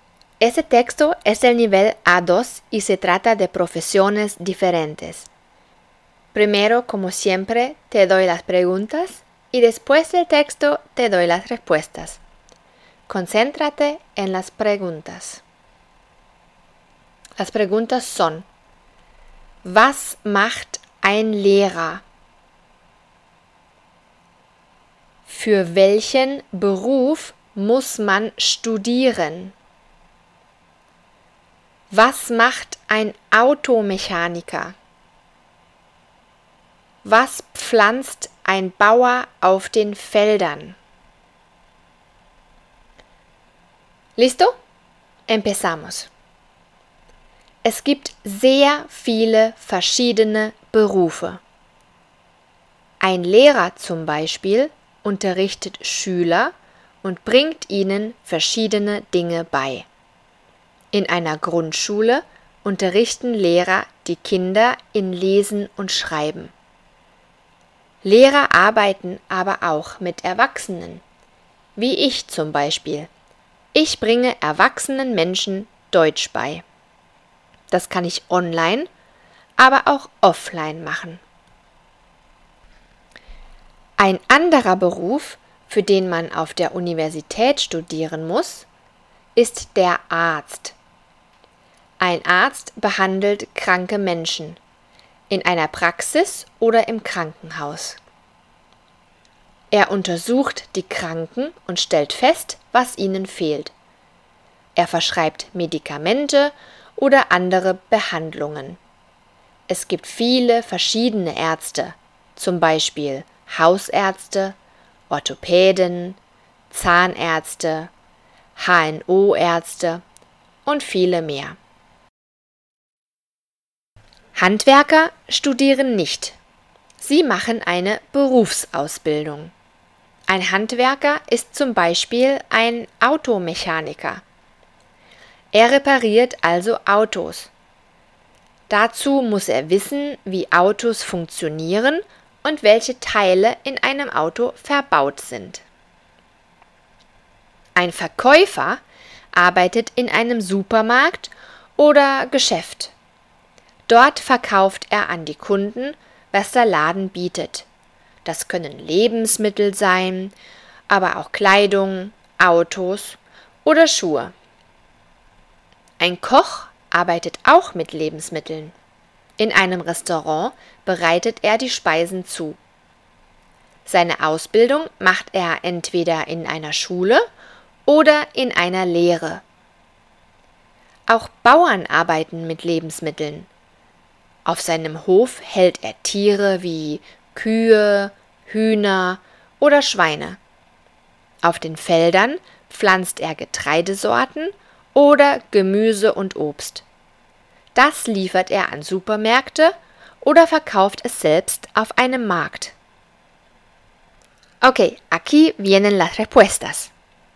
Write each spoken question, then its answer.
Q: Was macht ein Lehrer?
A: Er unterrichtet Schüler.

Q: Für welchen Beruf muss man studieren?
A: Für den Arztberuf.

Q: Was macht ein Automechaniker?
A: Er repariert Autos.

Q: Was pflanzt ein Bauer auf den Feldern?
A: Getreidesorten oder Gemüse und Obst.